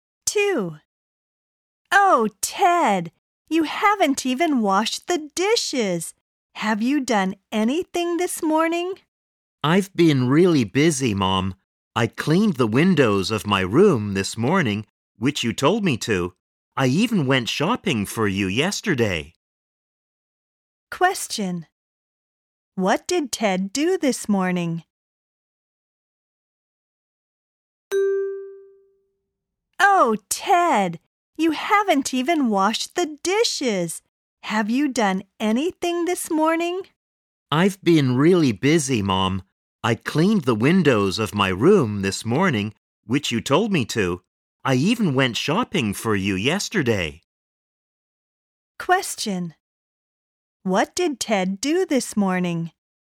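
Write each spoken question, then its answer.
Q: What did Ted do this morning?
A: He cleaned the windows of his room.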